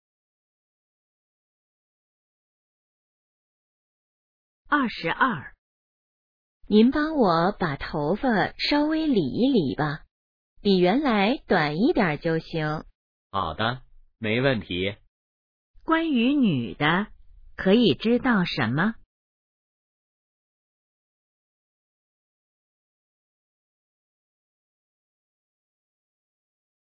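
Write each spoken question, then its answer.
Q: 关于女的,可以知道什么?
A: 想理发,剪短一点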